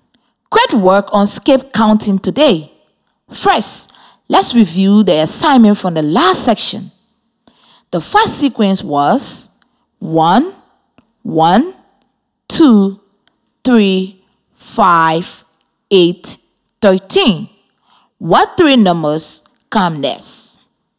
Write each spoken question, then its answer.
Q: What three numbers come next?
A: The next three numbers are 21, 34, and